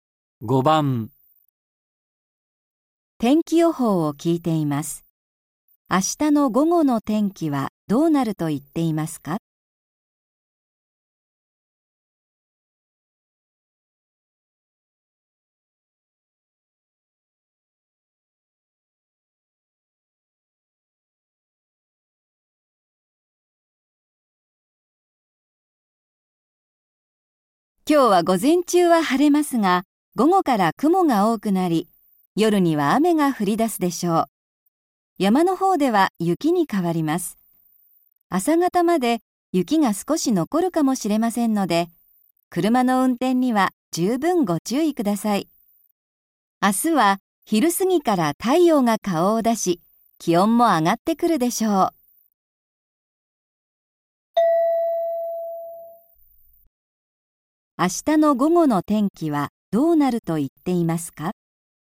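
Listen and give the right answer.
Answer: 晴れる(昼過ぎから太陽が出て、気温が上がる)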